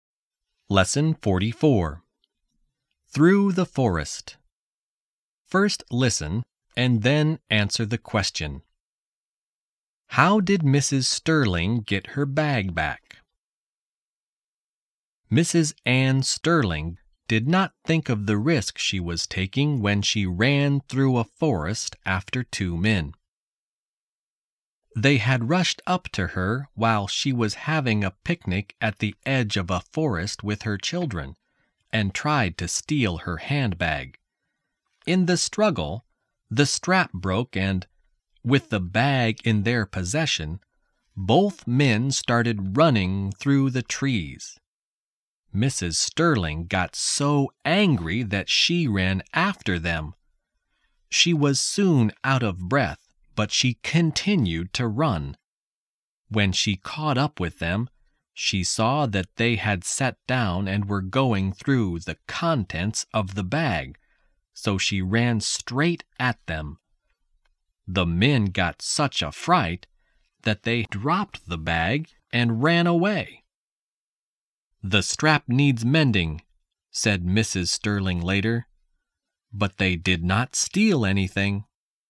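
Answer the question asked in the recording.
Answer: She ran straight at the two men, and they were so frightened that they dropped the bag and ran away.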